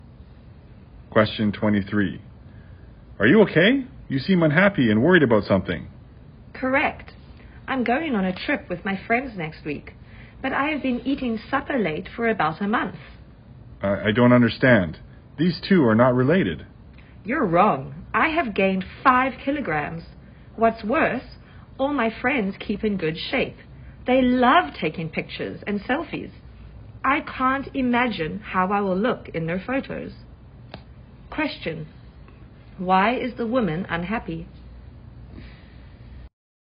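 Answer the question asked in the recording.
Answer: She has gained 5 kilograms and worries how she will look in her friends' photos on the trip.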